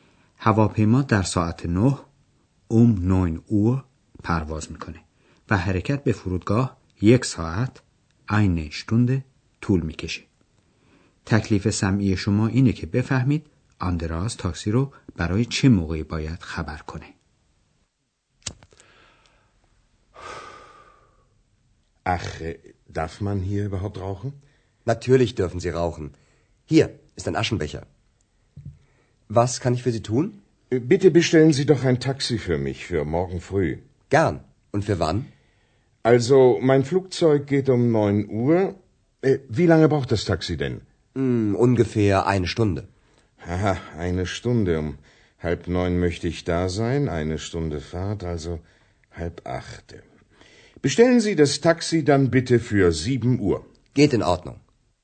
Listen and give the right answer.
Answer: پس آندراس باید تاکسی رو برای ساعت 7 فردا صبح سفارش بده.